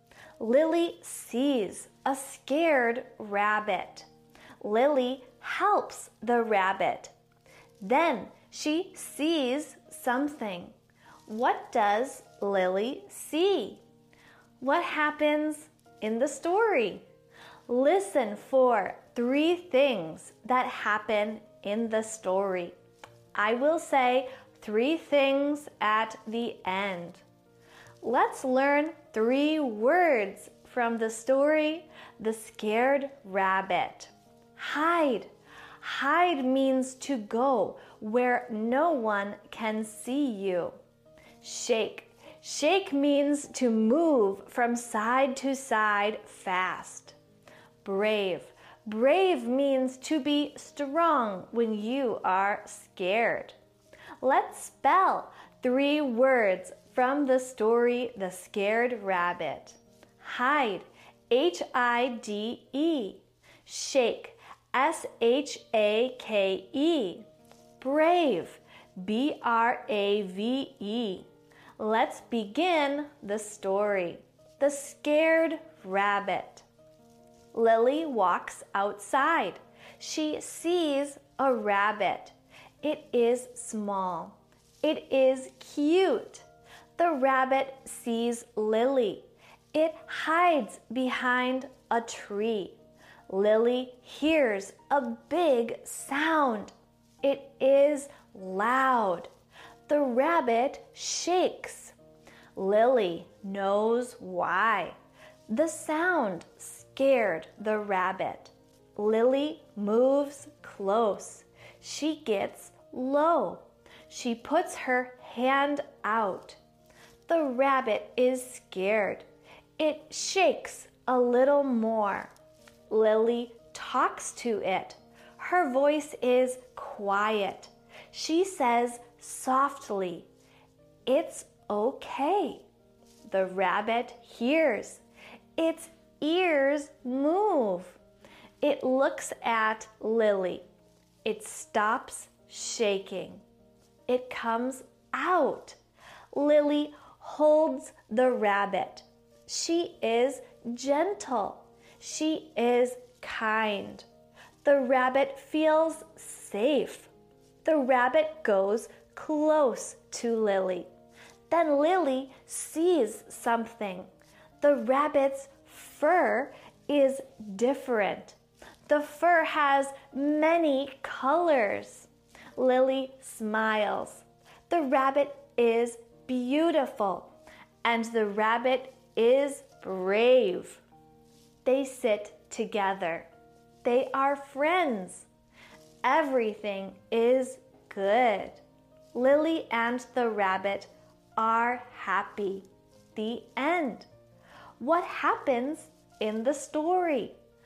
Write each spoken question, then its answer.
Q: What happens in the story?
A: 1. Lily sees a rabbit. The rabbit is scared. 2. Lily talks to the rabbit with a quiet voice. 3. The rabbit's fur changes to many colors.